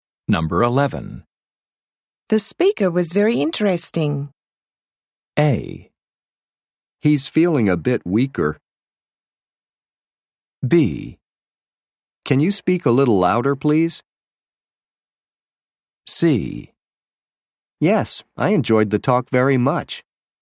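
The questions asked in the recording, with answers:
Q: The speaker was very interesting.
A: C: Yes, I enjoyed the talk very much.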